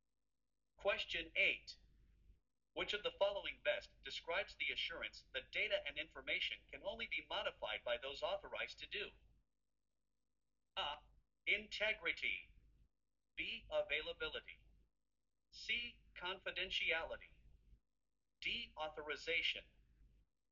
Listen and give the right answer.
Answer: The correct answer is A.